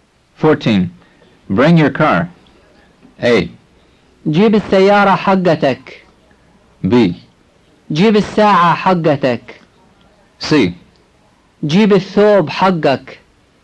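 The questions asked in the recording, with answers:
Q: Bring your car.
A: A: جيب السيارة حقتك.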